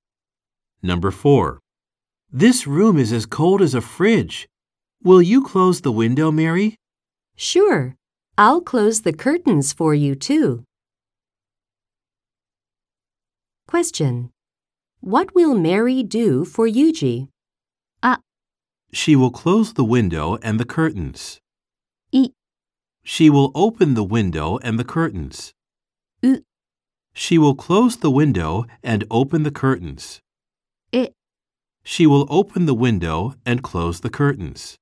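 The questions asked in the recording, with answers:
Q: What will Mary do for Yuji?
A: A: She will close the window and the curtains.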